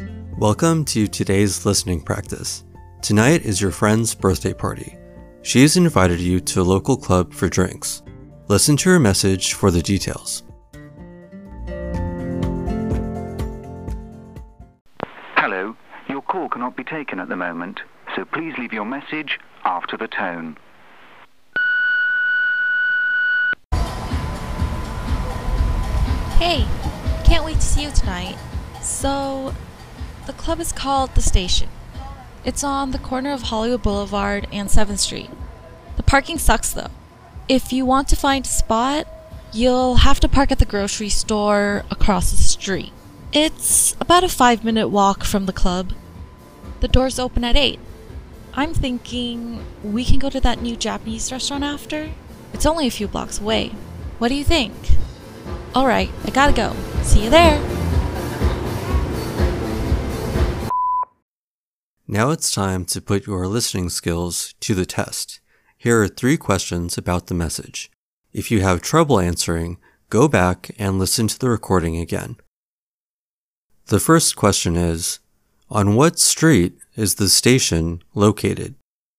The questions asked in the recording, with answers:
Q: On what street is the station located?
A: The club is located on the corner of Hollywood Boulevard and 7th Street.